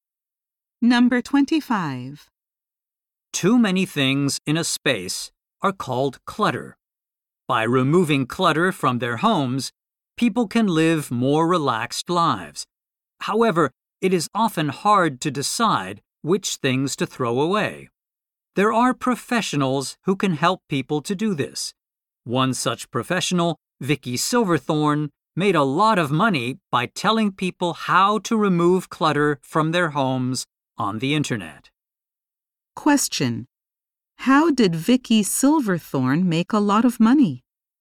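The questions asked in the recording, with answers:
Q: How did Vicky Silverthorne make a lot of money?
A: By telling people on the internet how to remove clutter from their homes.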